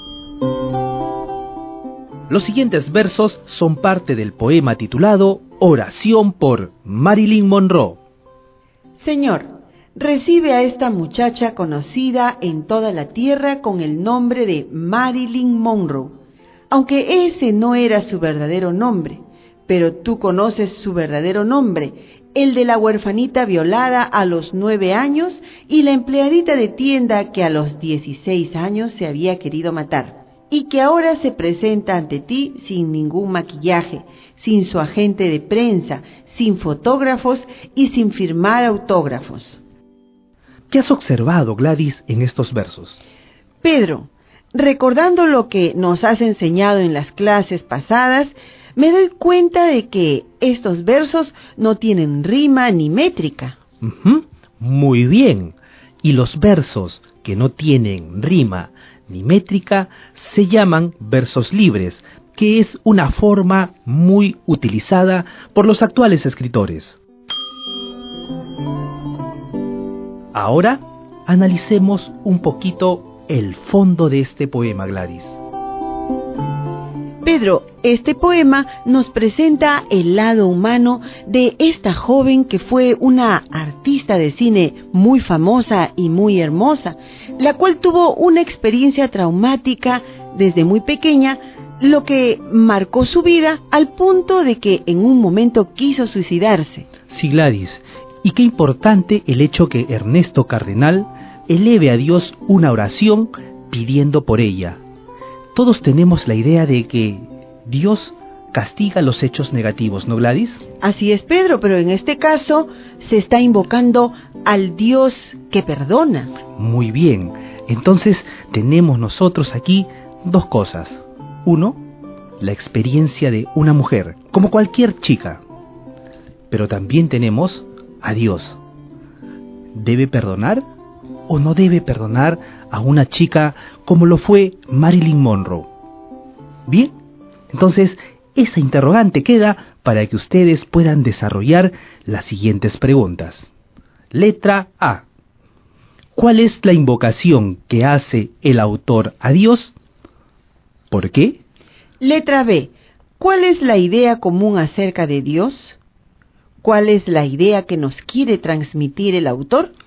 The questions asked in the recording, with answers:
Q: Letra B. ¿Cuál es la idea común acerca de Dios?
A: Gladys, todos tenemos la idea común de que Dios castiga.

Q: ¿Cuál es la idea que nos quiere transmitir el autor?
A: Sabemos muy bien que Dios perdona, y a pesar de haber hecho malas acciones, Pedro.